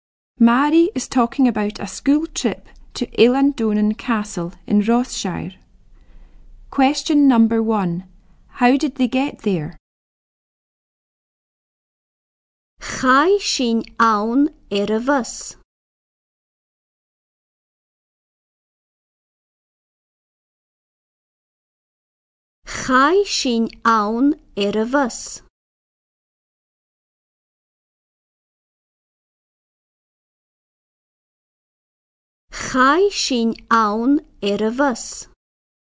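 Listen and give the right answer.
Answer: By bus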